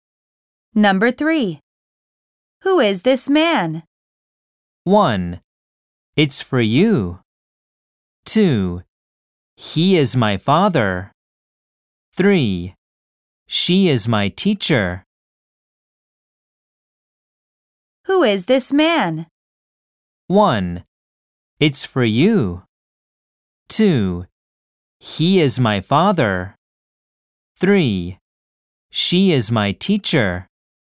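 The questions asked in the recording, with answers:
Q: Who is this man?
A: 2: He is my father.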